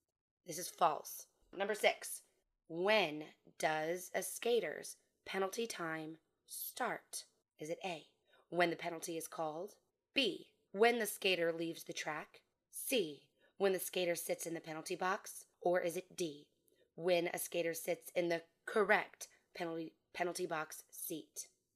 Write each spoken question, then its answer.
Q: when does a skater's penalty time start?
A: The answer is C, when the skater sits in the penalty box.